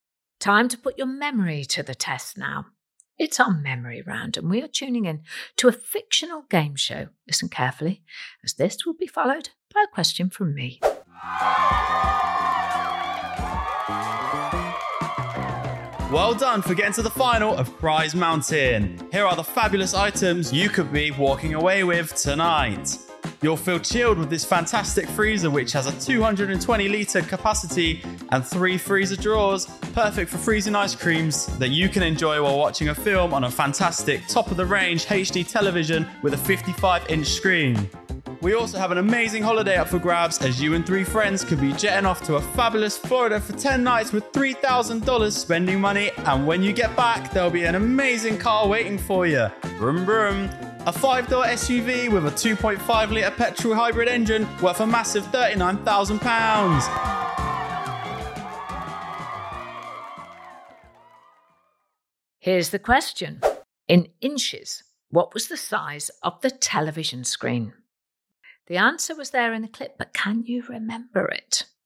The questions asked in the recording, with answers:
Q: In inches, what was the size of the television screen?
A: And the answer was 55 inches.